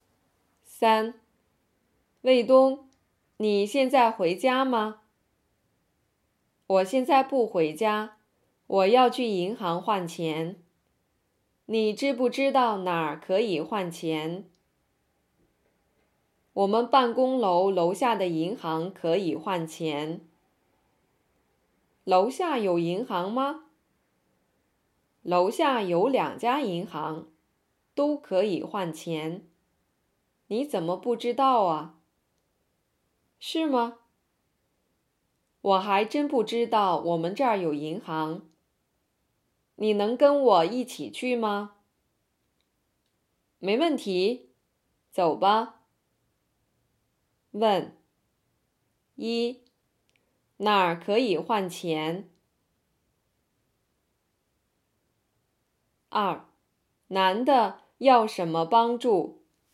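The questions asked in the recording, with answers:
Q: 哪儿可以换钱?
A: 办公楼楼下的银行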